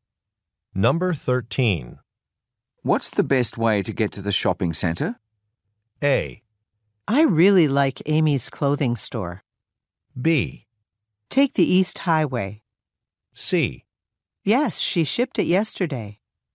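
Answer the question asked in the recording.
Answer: B: Take the East Highway.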